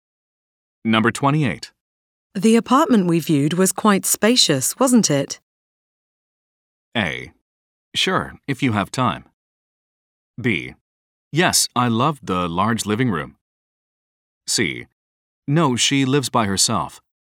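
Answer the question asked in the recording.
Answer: B: Yes, I loved the large living room.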